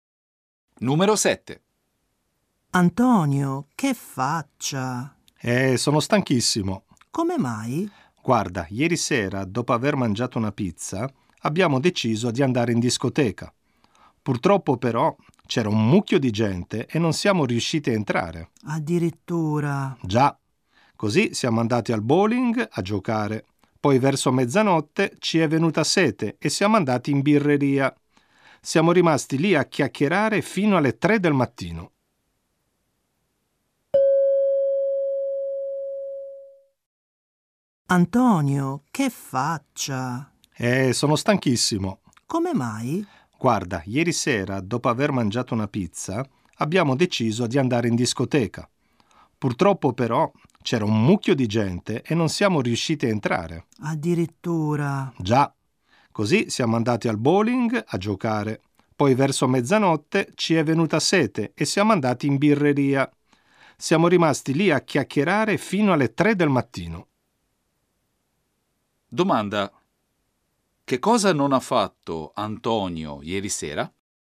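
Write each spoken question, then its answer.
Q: Domanda. Che cosa non ha fatto Antonio ieri sera?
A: Non è entrato in discoteca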